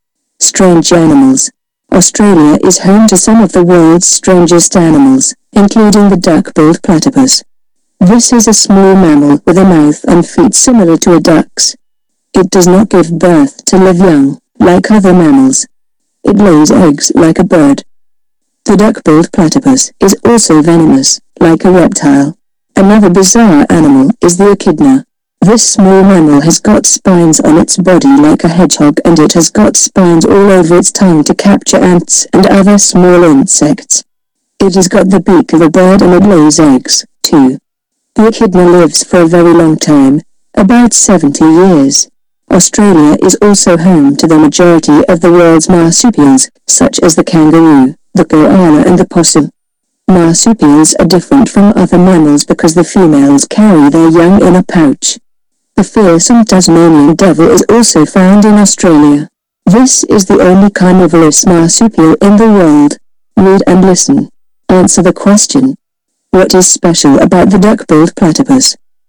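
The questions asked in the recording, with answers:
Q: What is special about the duck-billed platypus?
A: It is a mammal with a duck-like mouth and feet that lays eggs like a bird and is venomous like a reptile.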